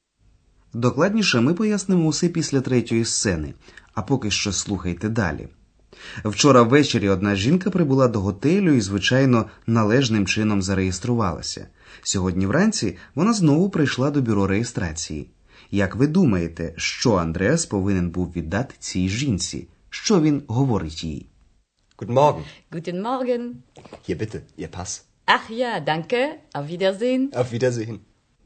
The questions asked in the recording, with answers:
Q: Як ви думаєте, що Андреас повинен був віддати цій жінці?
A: Андреас повернув жінці паспорт, який напередодні ввечері взяв у неї для реєстрації.

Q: Що він говорить їй?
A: При цьому він говорить: ось, будь ласка, ваш паспорт.